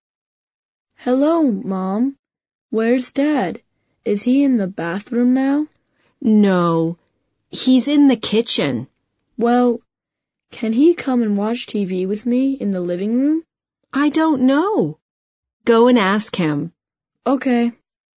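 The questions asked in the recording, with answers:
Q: Where's Dad now?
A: In the kitchen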